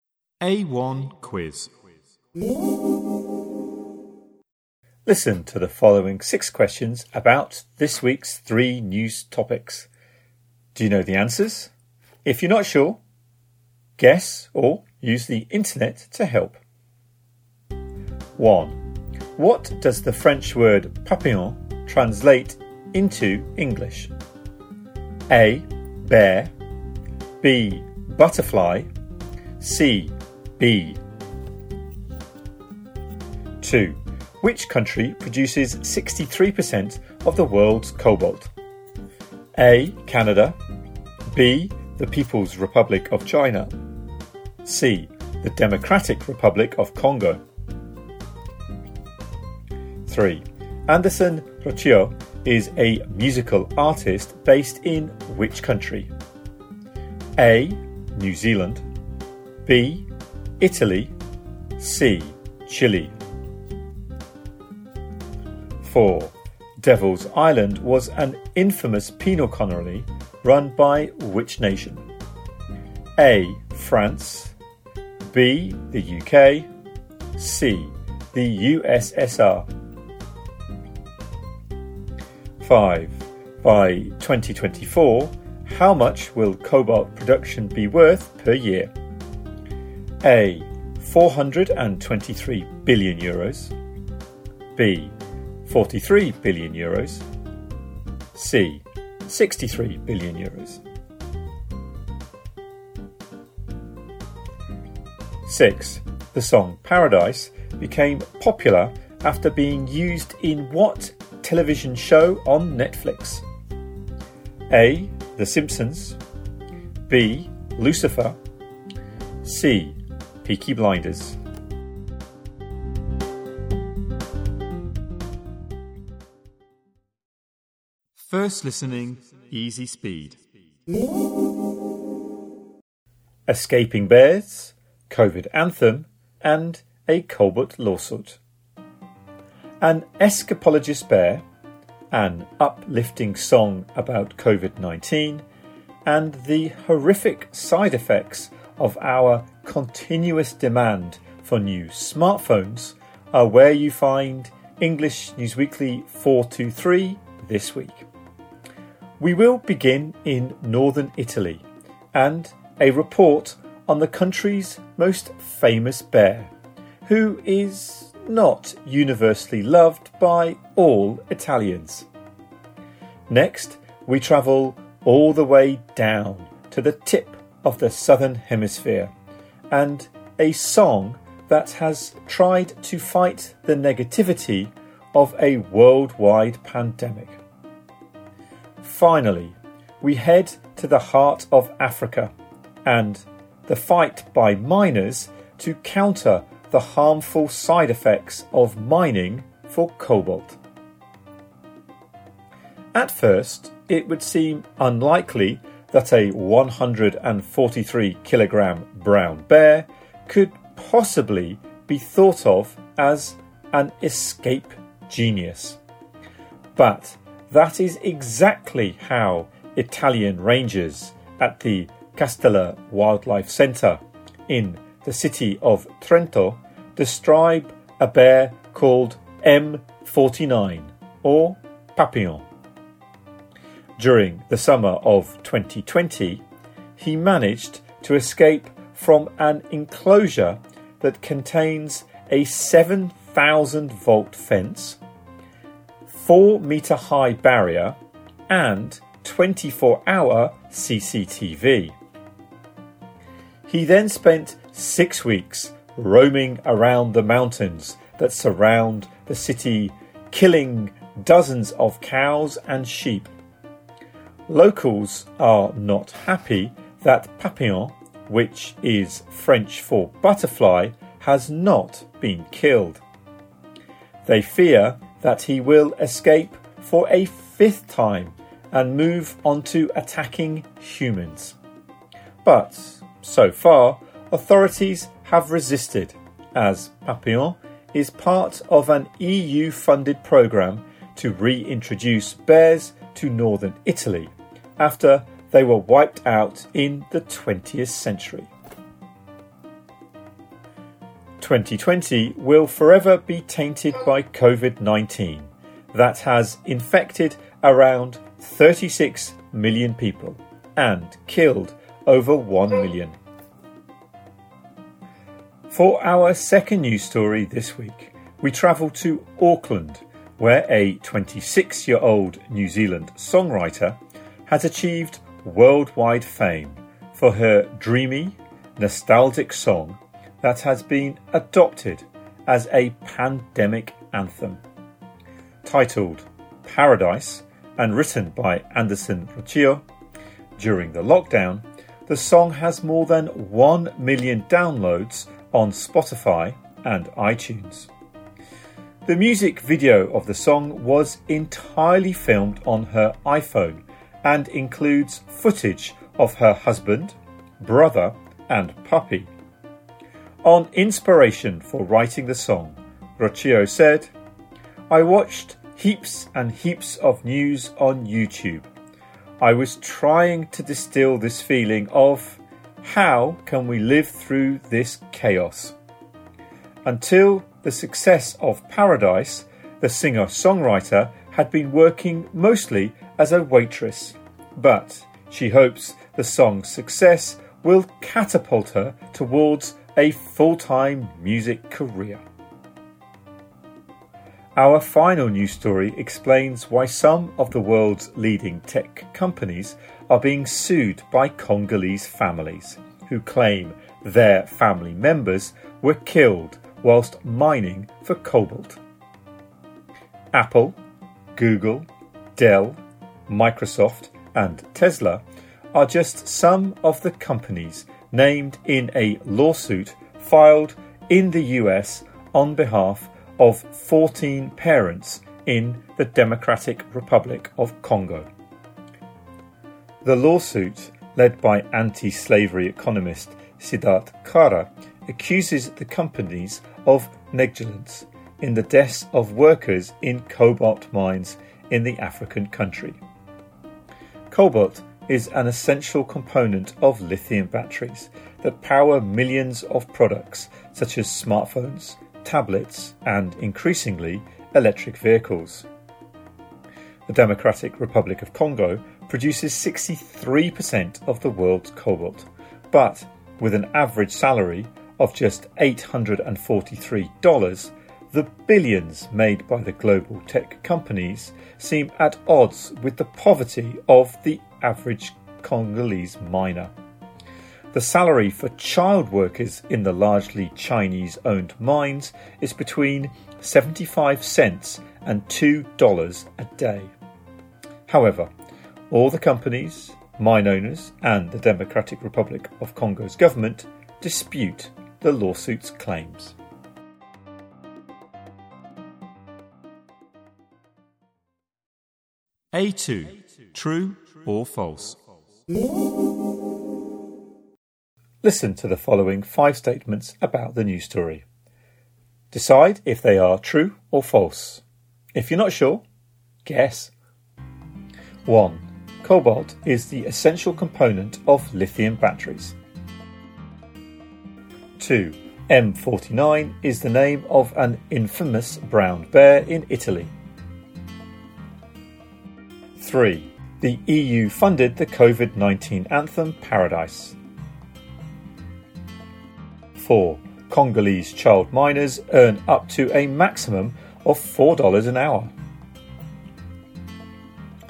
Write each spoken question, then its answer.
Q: What does the French word papillon translate into English?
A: 1B

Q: Which country produces 63% of the world's cobalt?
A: 2C

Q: Cobalt is the essential component of lithium batteries.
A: 1 true

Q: M49 is the name of an infamous brown bear in Italy.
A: 2 true

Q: Congolese child miners earn up to a maximum of $4 an hour.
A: 4 false